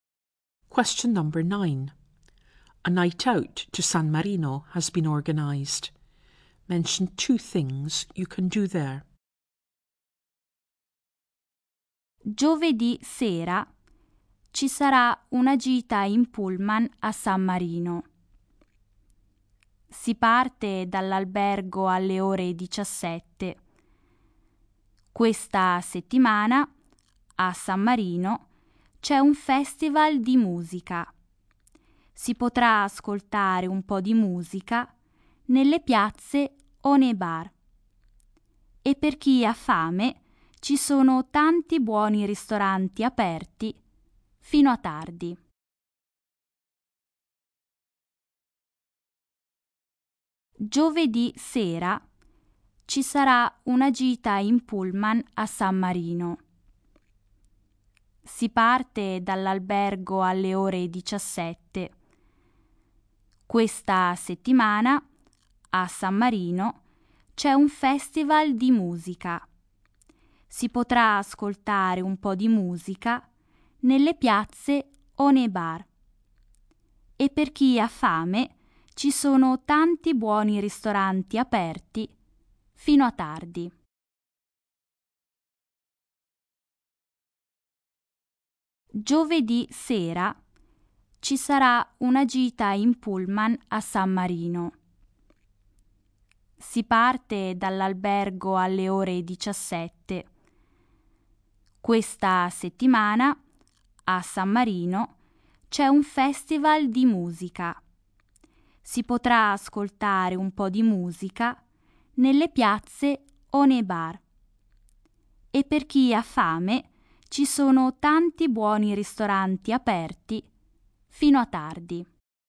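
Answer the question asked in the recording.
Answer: Listen to music (there's a music festival) in the squares or bars, and eat in restaurants open until late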